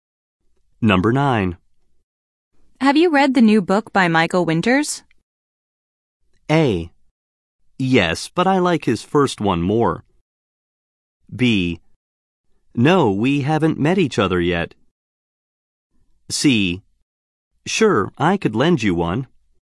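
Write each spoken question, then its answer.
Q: Have you read the new book by Michael Winters?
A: A: Yes, but I like his first one more.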